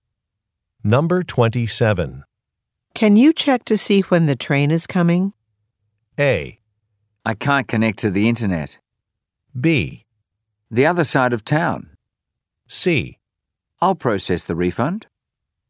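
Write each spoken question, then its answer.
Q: Can you check to see when the train is coming?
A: A: I can't connect to the internet.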